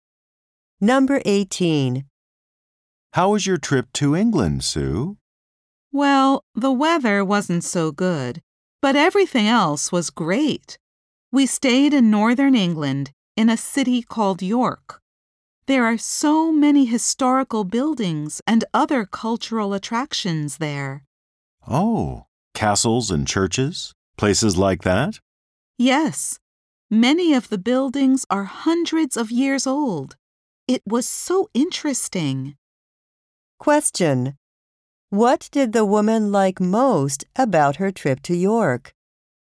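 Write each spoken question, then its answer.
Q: What did the woman like most about her trip to York?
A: The historical buildings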